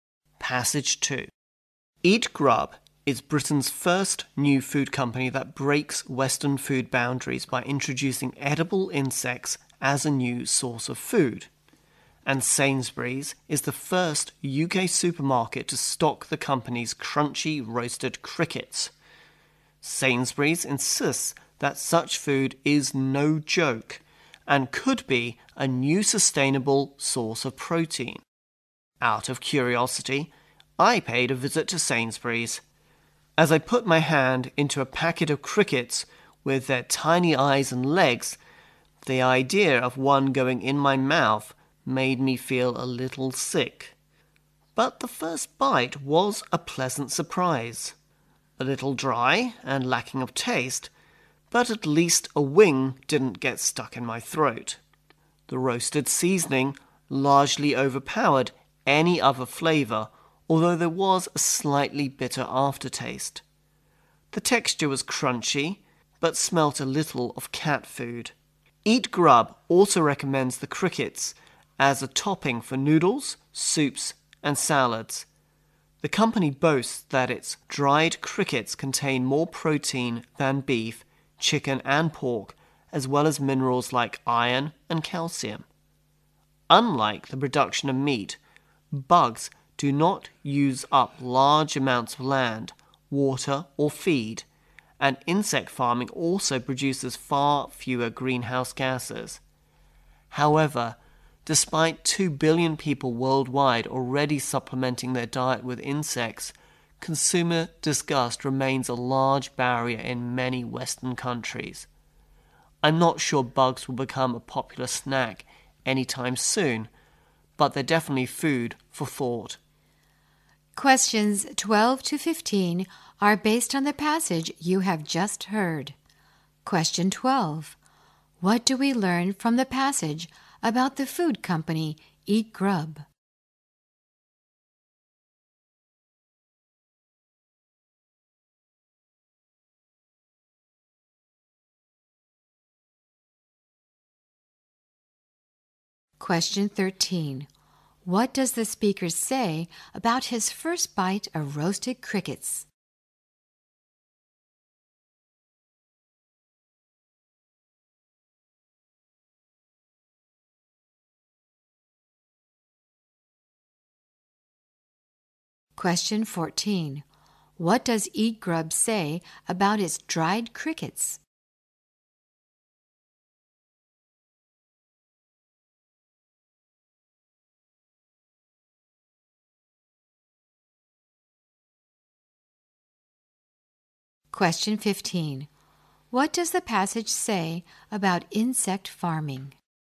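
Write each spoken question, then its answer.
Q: What do we learn from the passage about the food company Eat Grub?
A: It is Britain's first company to introduce edible insects as food.

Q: What does the speaker say about his first bite of roasted crickets?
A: It was a pleasant surprise.

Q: What does Eat Grub say about its dried crickets?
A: They contain more protein than beef, chicken and pork.

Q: What does the passage say about insect farming?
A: It produces far fewer greenhouse gases and uses less land, water and feed.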